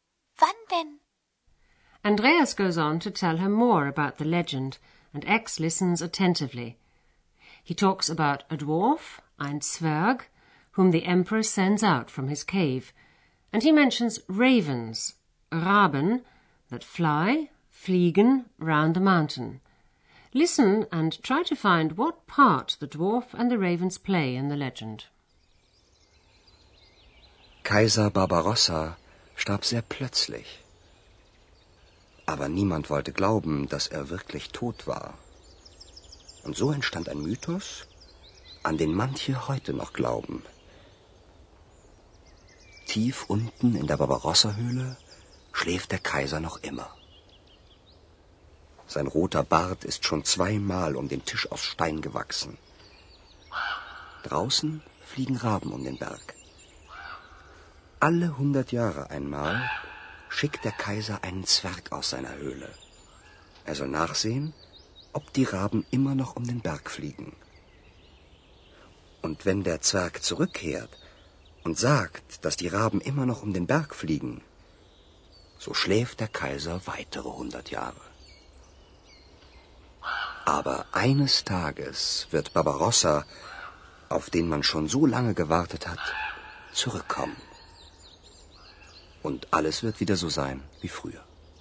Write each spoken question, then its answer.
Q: Listen and try to find what part the dwarf and the ravens play in the legend.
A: Once every hundred years, Barbarossa sends a dwarf out of his cave.